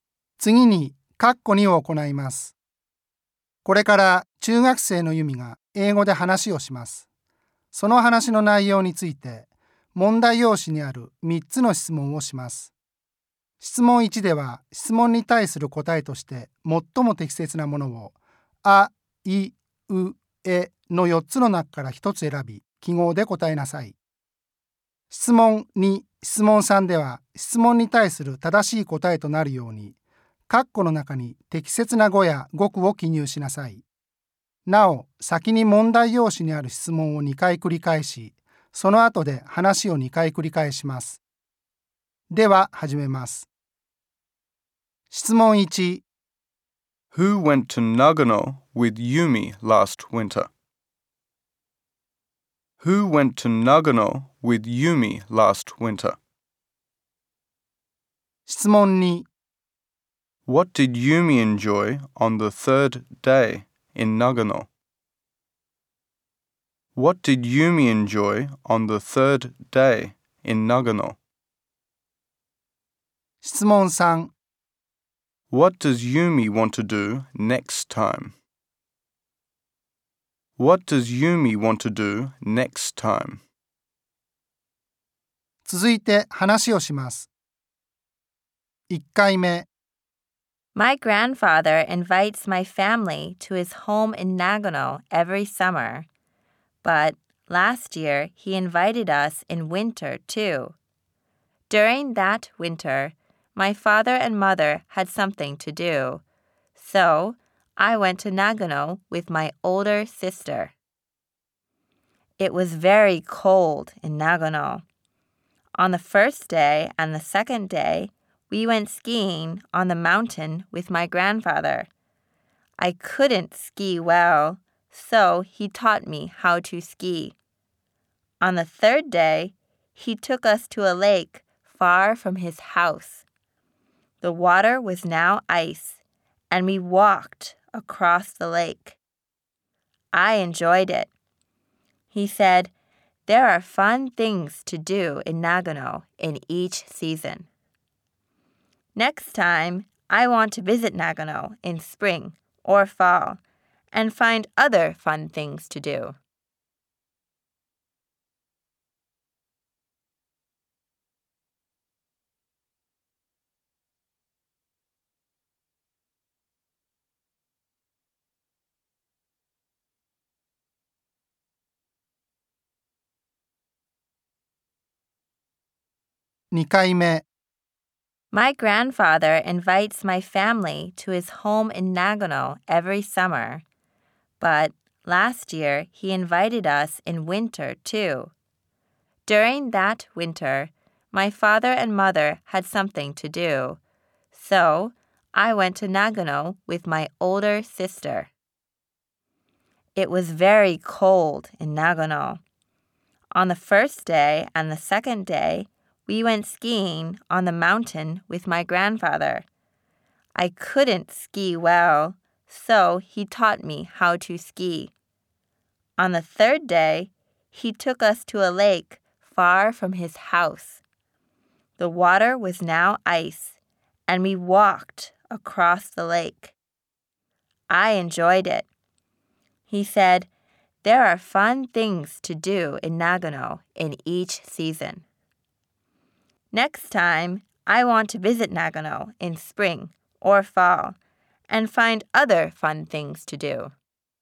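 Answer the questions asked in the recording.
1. Her older sister
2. Walking across the frozen lake
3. Visit Nagano in spring or fall and find other fun things to do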